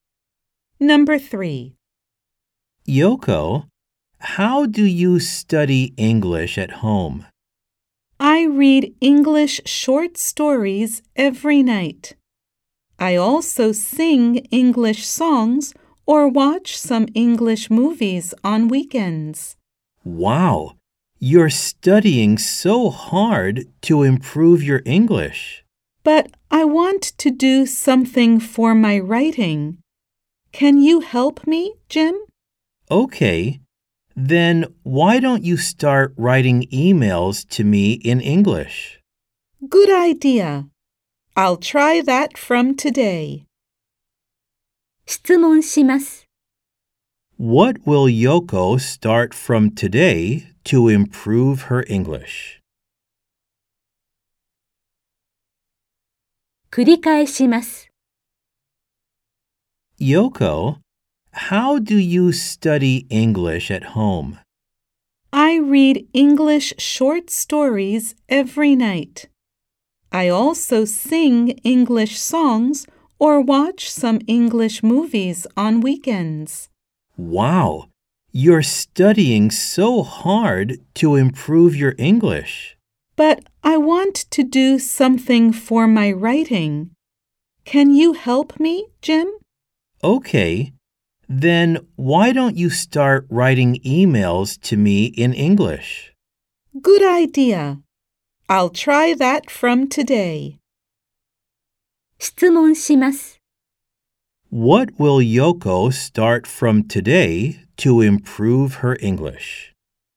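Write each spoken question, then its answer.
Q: What will Yoko start from today to improve her English?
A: Writing emails to Jim in English.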